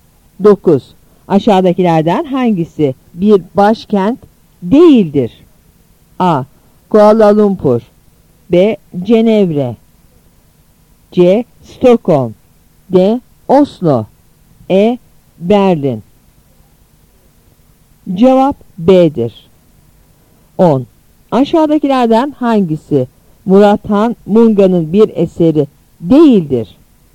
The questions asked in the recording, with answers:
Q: Aşağıdakilerden hangisi bir başkent değildir?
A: Cevap B'dir.